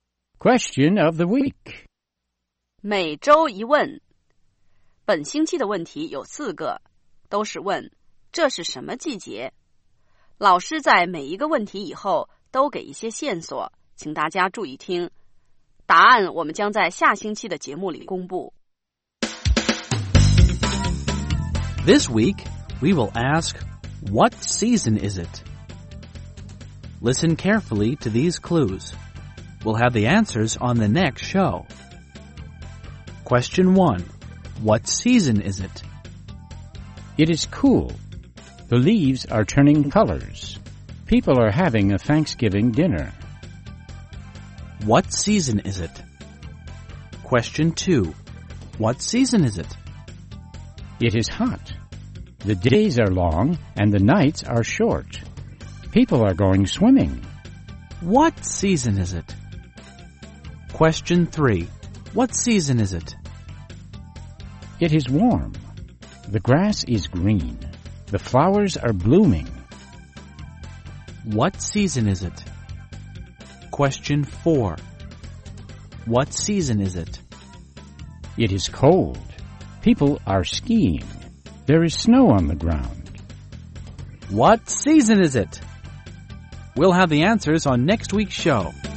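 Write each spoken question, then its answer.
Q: What season is it?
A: Autumn (fall)

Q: What season is it?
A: Summer

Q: What season is it?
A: Spring

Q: What season is it?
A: Winter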